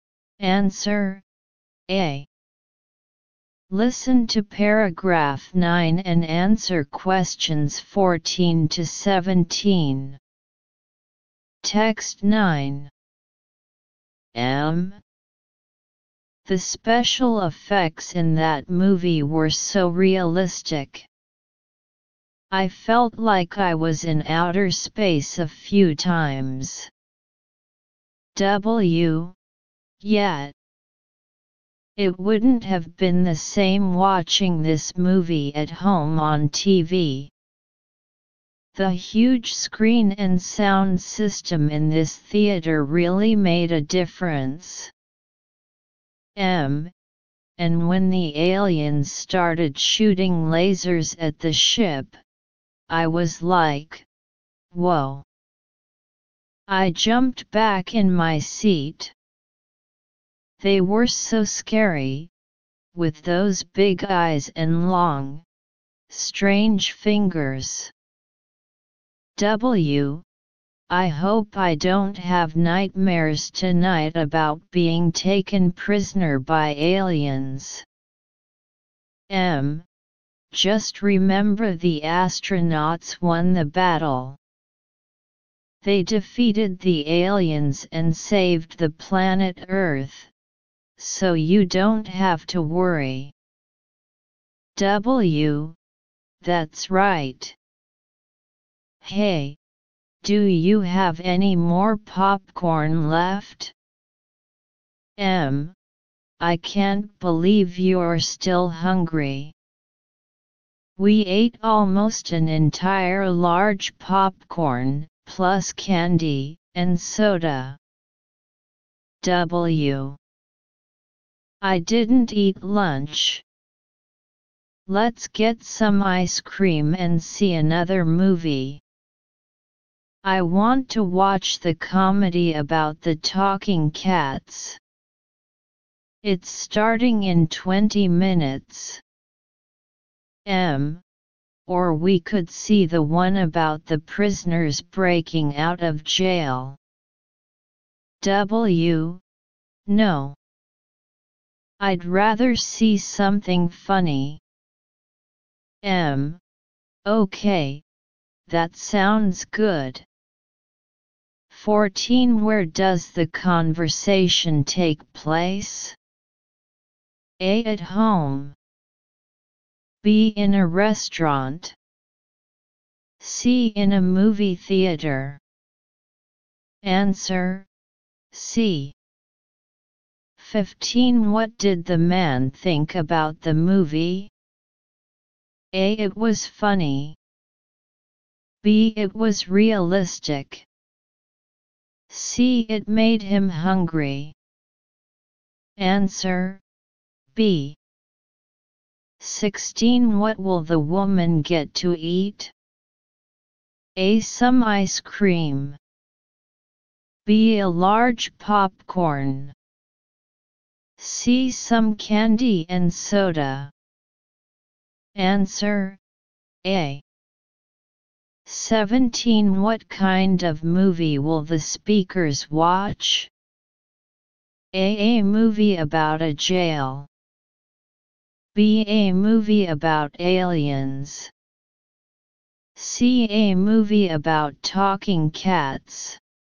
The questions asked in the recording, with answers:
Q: Where does the conversation take place?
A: Answer C.

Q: What did the man think about the movie?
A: Answer B.

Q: What will the woman get to eat?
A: Answer A.